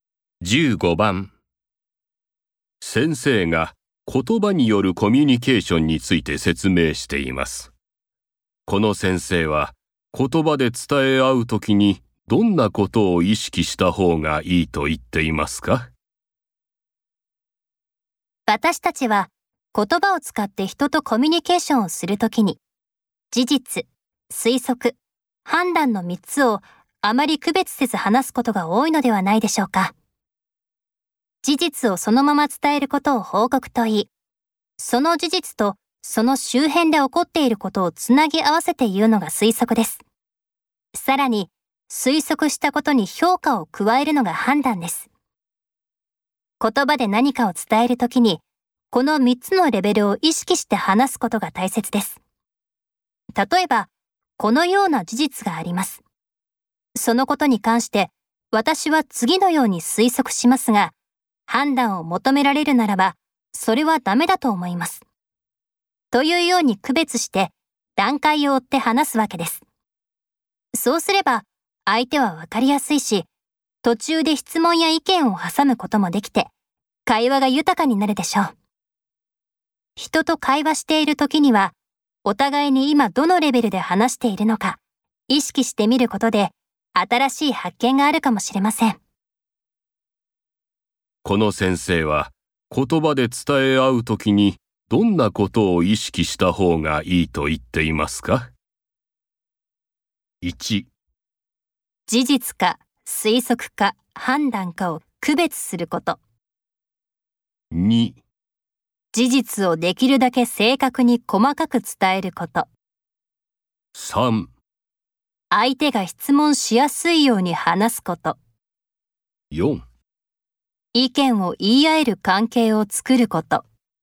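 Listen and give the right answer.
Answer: 1: 事実か推測か判断かを区別すること。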